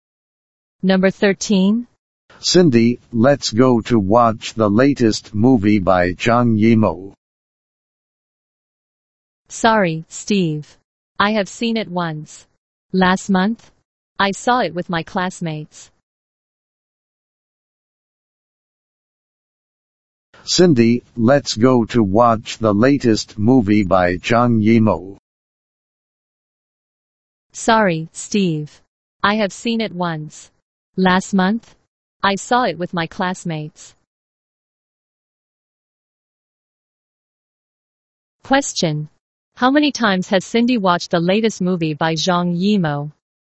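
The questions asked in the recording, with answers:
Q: Question. How many times has Cindy watched the latest movie by Zhang Yimou?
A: Once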